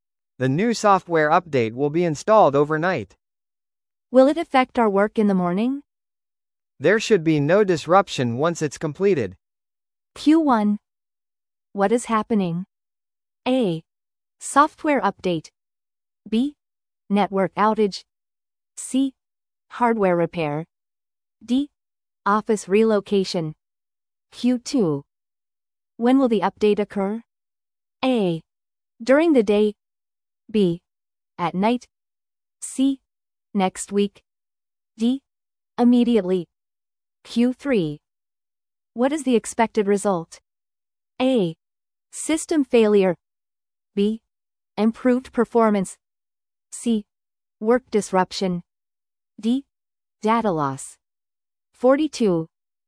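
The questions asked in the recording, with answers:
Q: What is happening?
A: A: Software update.

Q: When will the update occur?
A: B: At night.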